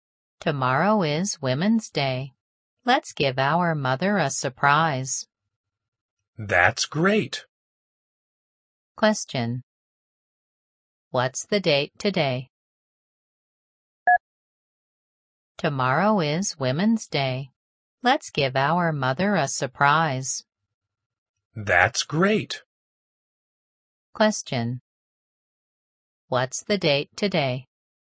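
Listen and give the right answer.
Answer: March 7th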